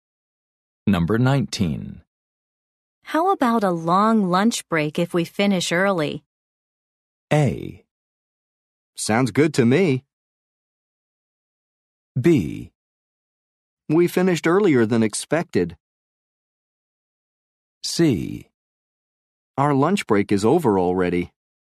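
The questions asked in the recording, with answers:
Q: How about a long lunch break if we finish early?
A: A: Sounds good to me.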